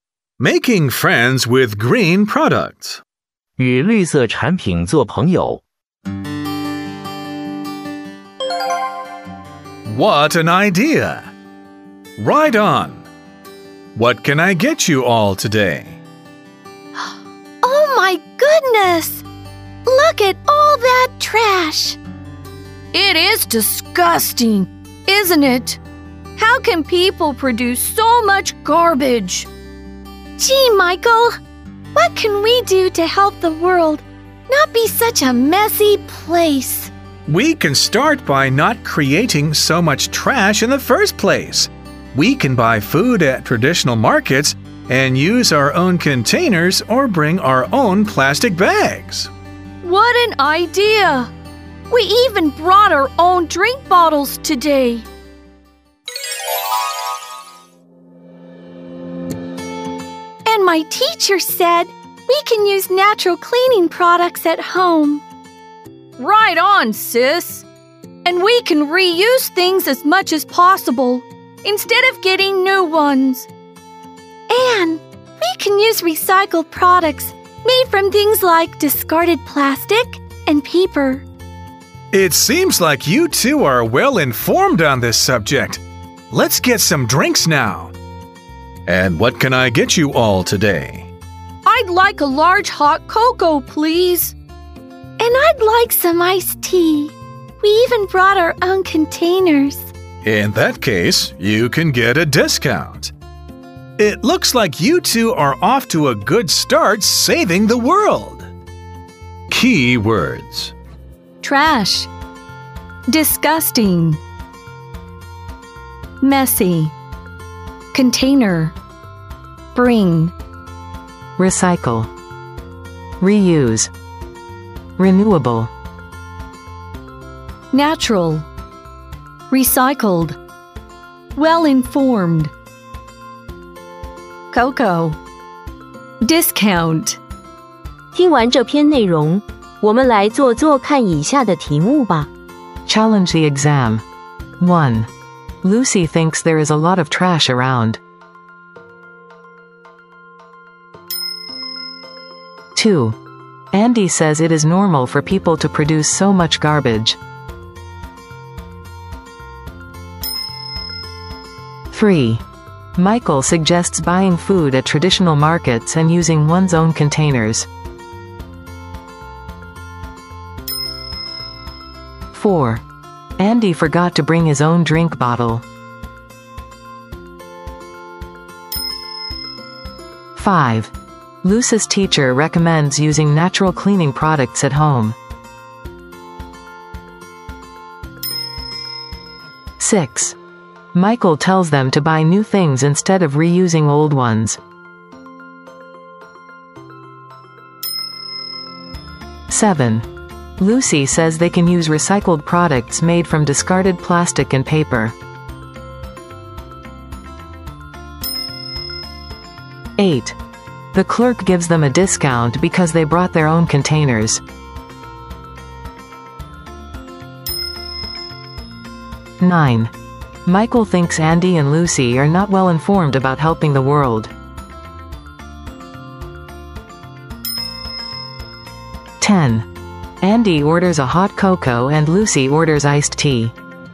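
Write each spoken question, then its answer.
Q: Andy says it is normal for people to produce so much garbage.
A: False

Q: Andy forgot to bring his own drink bottle.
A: False

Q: Michael tells them to buy new things instead of reusing old ones.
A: False

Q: The clerk gives them a discount because they brought their own containers.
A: True

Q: Michael thinks Andy and Lucy are not well informed about helping the world.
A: False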